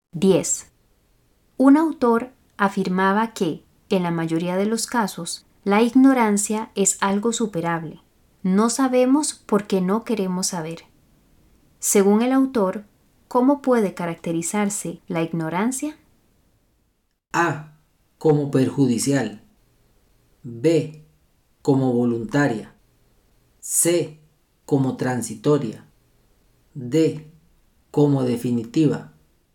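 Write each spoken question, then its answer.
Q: Según el autor, ¿cómo puede caracterizarse la ignorancia?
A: B: Como voluntaria.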